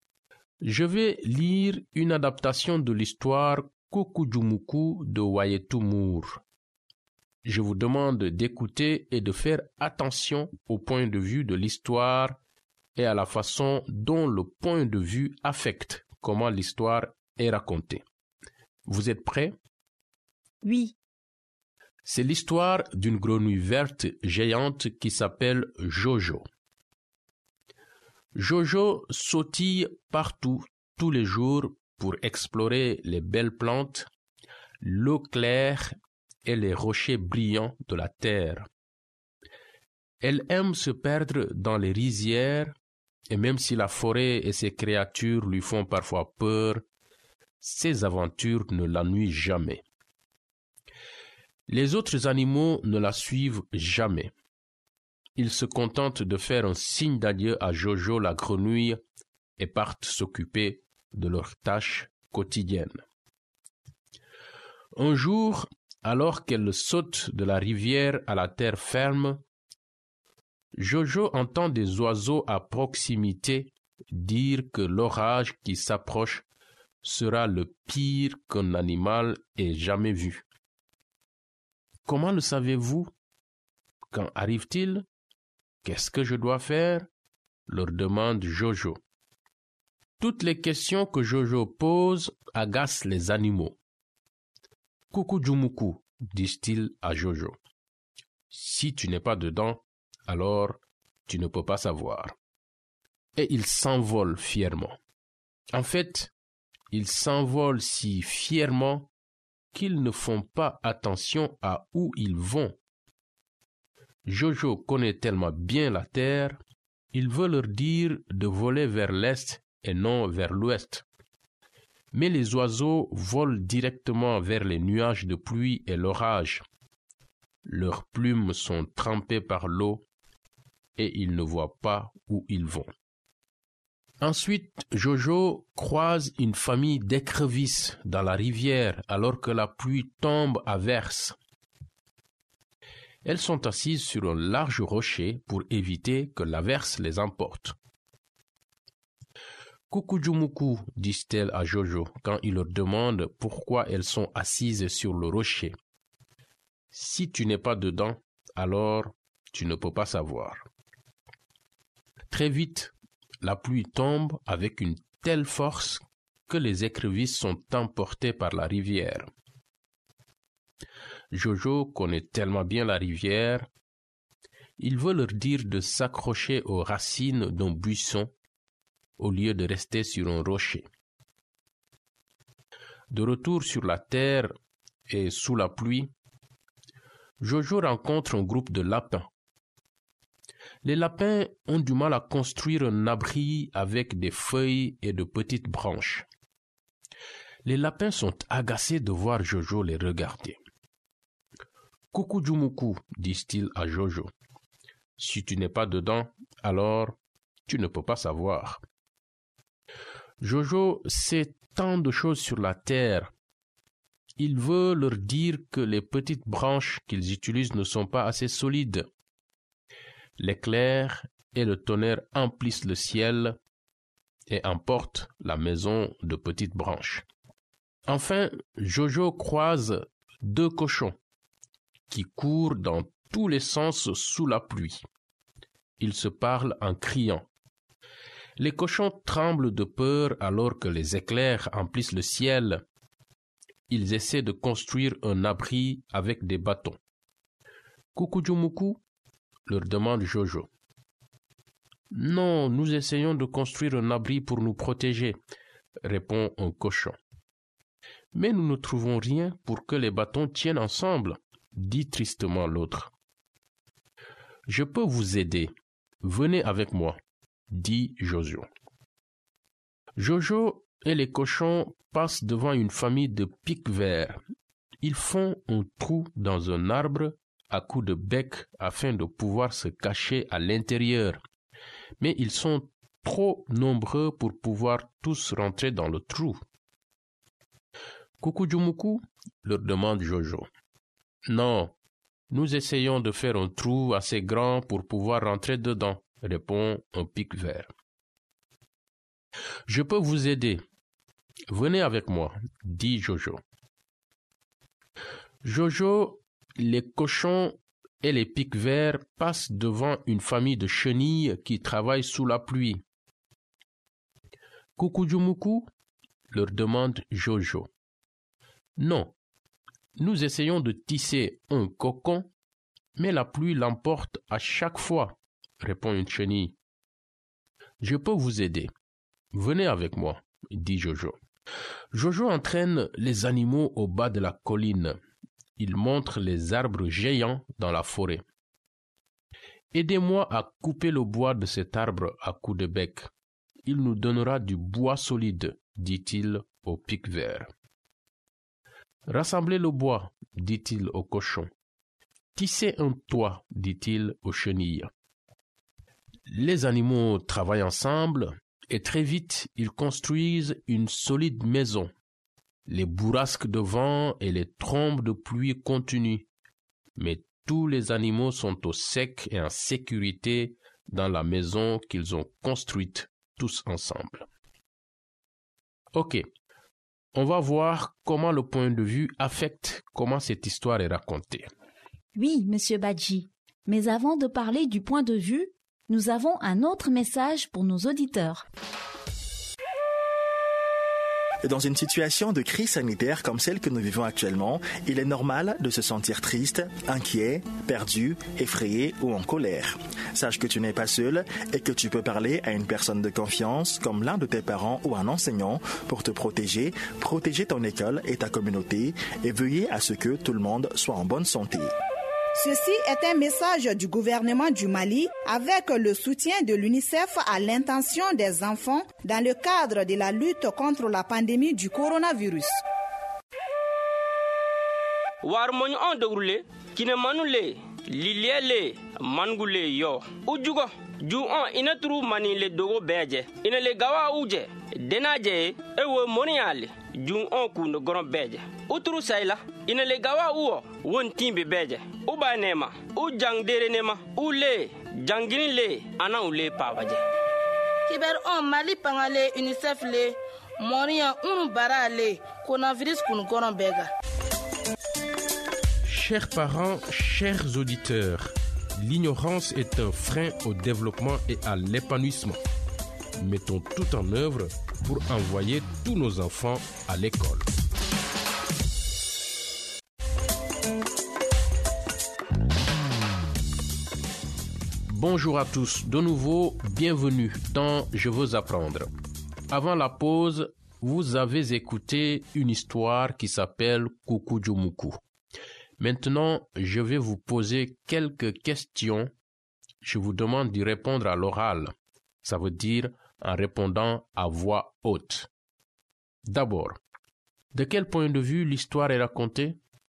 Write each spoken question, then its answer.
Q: D'abord, de quel point de vue l'histoire est racontée?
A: À la troisième personne.